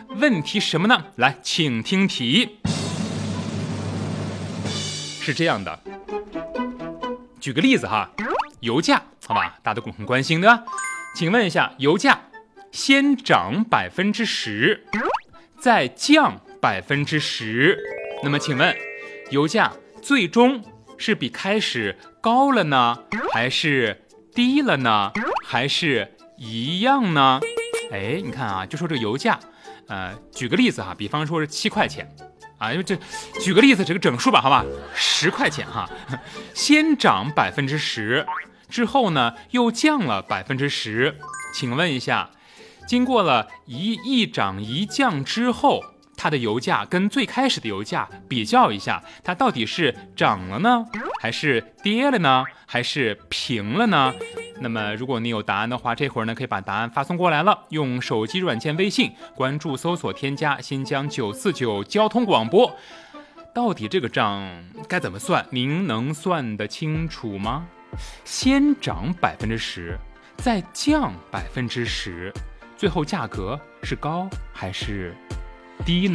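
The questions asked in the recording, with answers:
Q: 请问一下,油价先涨10%再降10%,那么请问油价最终是比开始高了呢,还是低了呢,还是一样呢?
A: 低了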